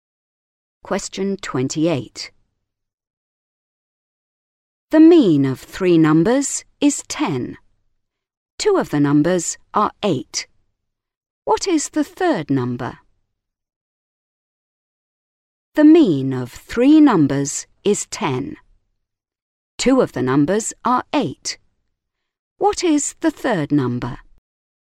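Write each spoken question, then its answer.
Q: What is the third number?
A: 14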